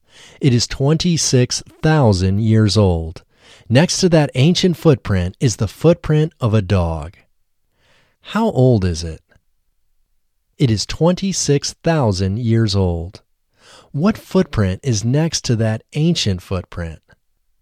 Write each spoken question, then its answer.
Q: What footprint is next to that ancient footprint?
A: The footprint of a dog is next to that ancient footprint.